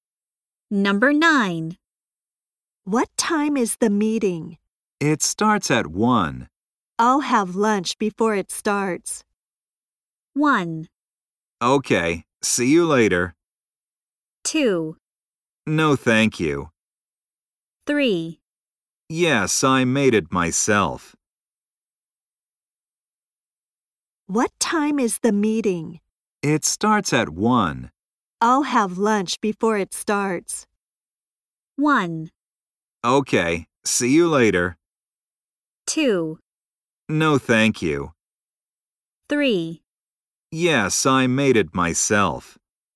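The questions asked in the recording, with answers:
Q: I'll have lunch before it starts.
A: 1: Okay, see you later.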